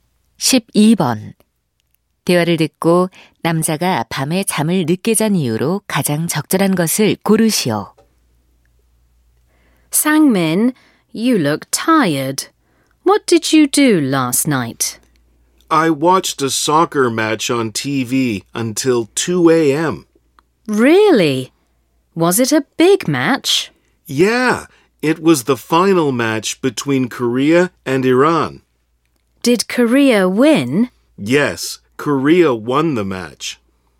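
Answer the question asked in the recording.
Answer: TV로 축구 경기를 봐서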